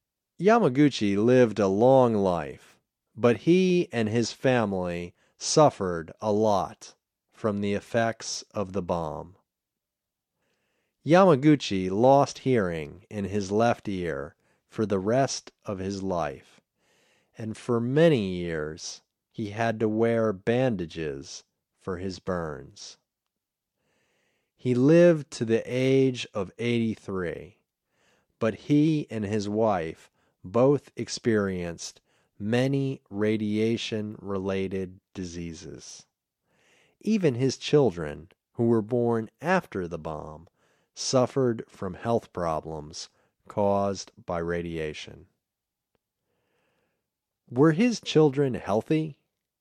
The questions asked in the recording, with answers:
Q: Were his children healthy?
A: No, his children weren't healthy.